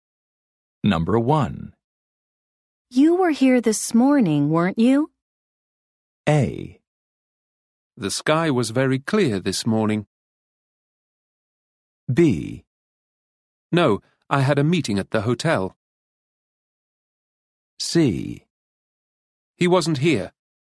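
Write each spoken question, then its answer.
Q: You were here this morning, weren't you?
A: B: No, I had a meeting at the hotel.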